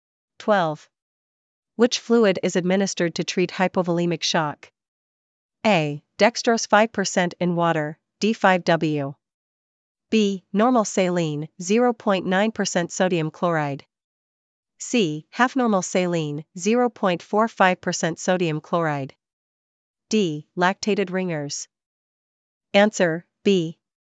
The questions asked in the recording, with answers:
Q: Which fluid is administered to treat hypovolemic shock?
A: Answer, B. Normal saline, 0.9% sodium chloride.